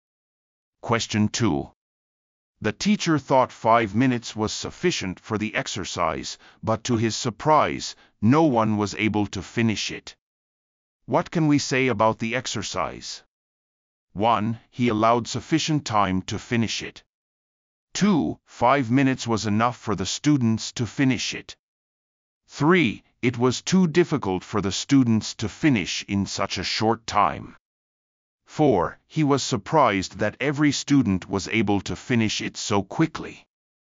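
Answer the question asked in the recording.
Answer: 3: It was too difficult for the students to finish in such a short time.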